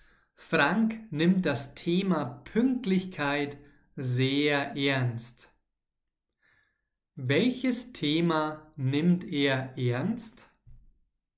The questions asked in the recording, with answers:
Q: Welches Thema nimmt er ernst?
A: das Thema Pünktlichkeit. Frank nimmt das Thema Pünktlichkeit sehr ernst.